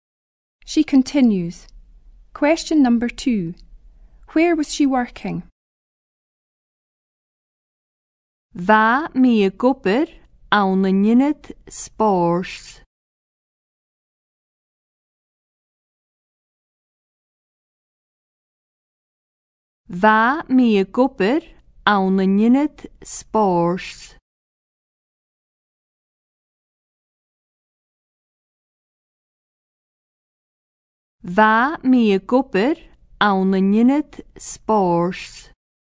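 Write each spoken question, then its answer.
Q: Where was she working?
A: In a sports centre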